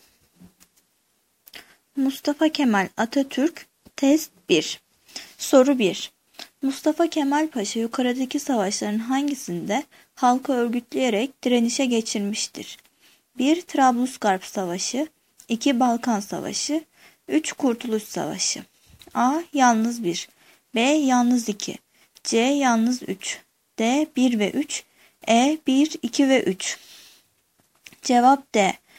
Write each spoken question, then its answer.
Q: Mustafa Kemal Paşa yukarıdaki savaşların hangisinde halkı örgütleyerek direnişe geçirmiştir?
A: Cevap D.